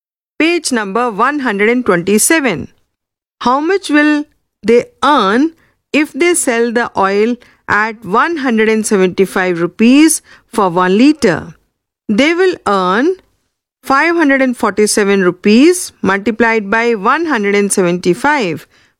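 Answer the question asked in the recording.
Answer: 95,725 rupees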